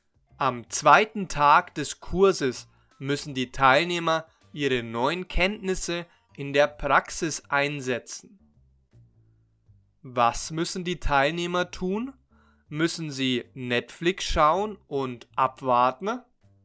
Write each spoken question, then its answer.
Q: Müssen sie Netflix schauen und abwarten?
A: Nein, sie müssen nicht Netflix schauen und abwarten, sondern ihre neuen Kenntnisse in der Praxis einsetzen.